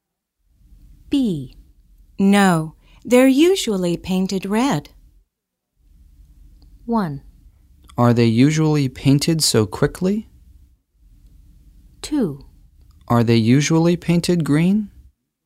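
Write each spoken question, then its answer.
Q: No, they're usually painted red.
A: 2: Are they usually painted green?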